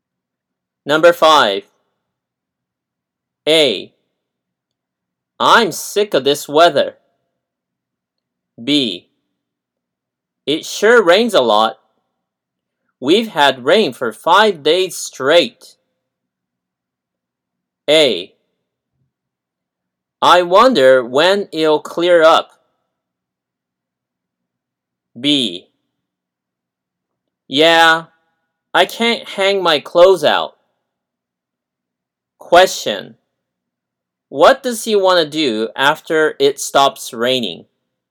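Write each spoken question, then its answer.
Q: Question. What does he want to do after it stops raining?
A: Hang his clothes out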